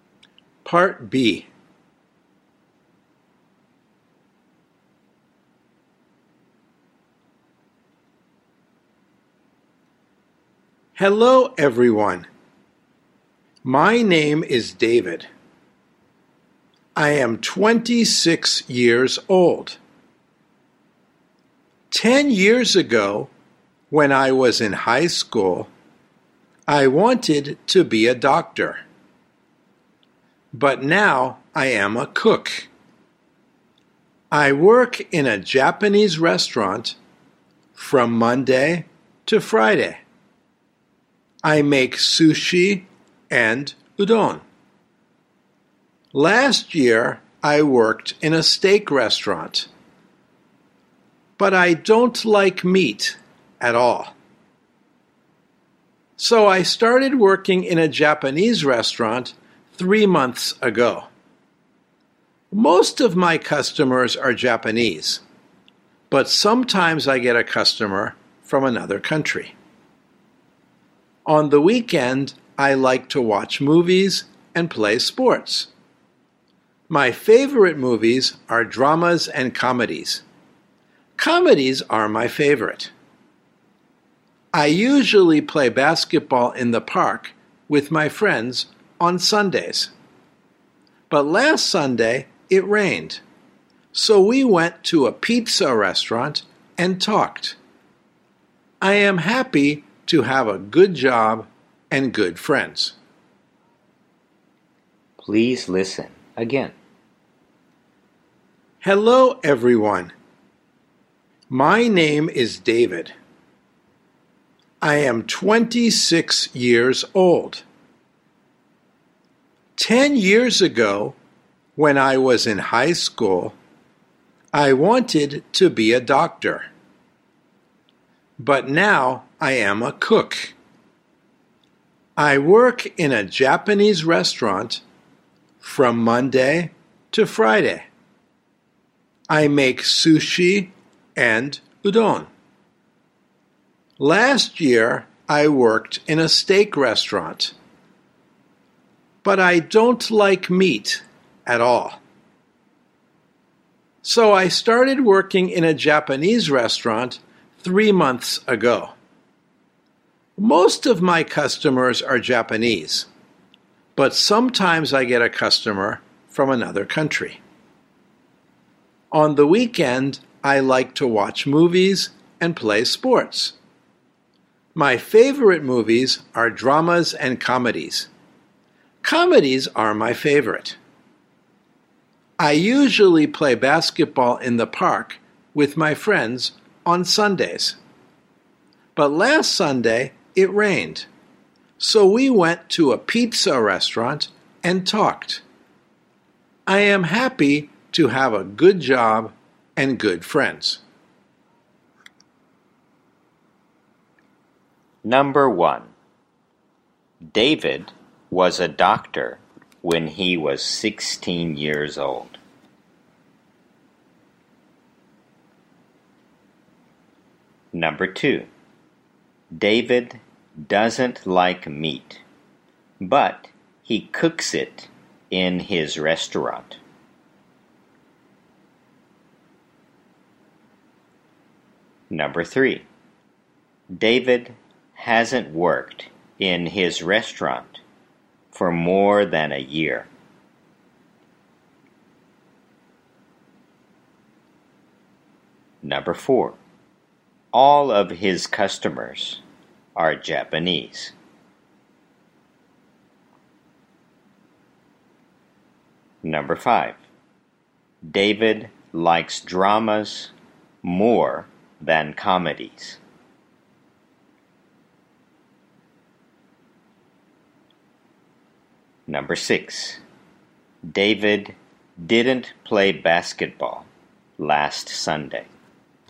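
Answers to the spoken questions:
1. False
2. False
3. True
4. False
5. False
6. True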